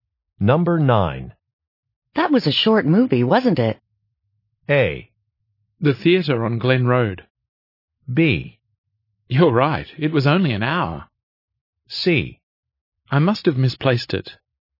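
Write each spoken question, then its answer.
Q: That was a short movie, wasn't it?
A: B: You're right, it was only an hour.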